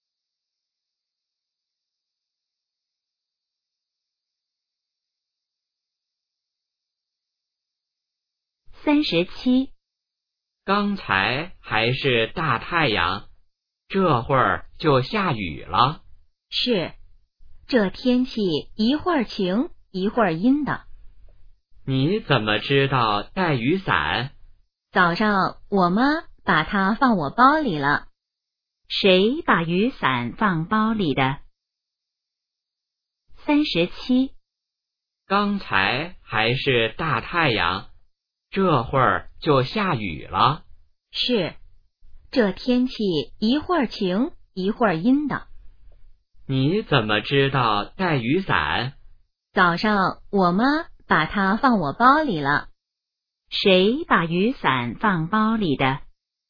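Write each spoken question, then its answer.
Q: 谁把雨伞放包里的?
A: 妈妈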